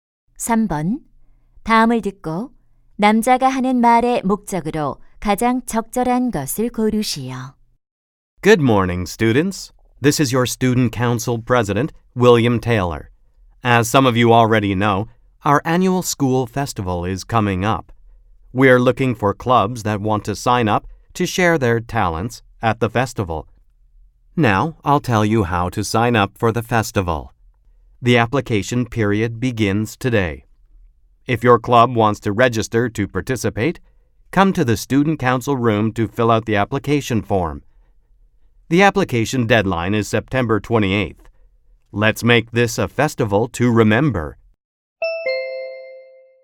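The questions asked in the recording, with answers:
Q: 다음을 듣고 남자가 하는 말의 목적으로 가장 적절한 것을 고르시오.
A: 학교 축제 참가 동아리 신청 방법을 안내하려고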